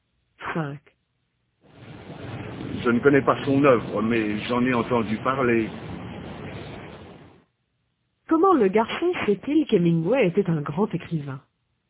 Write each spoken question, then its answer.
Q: Comment le garçon sait-il qu'Hemingway était un grand écrivain?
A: Parce qu'il en a entendu parler.